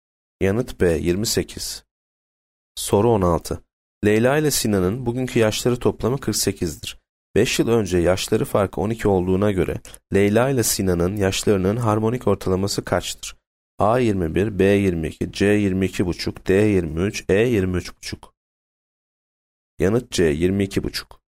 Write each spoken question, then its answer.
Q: 5 yıl önce yaşları farkı 12 olduğuna göre Leyla ile Sinan'ın yaşlarının harmonik ortalaması kaçtır?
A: Yanıt C 22,5.